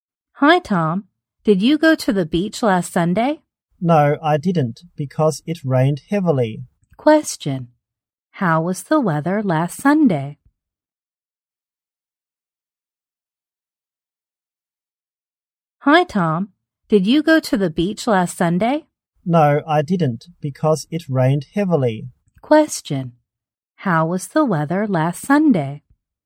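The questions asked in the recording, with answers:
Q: How was the weather last Sunday?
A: It rained heavily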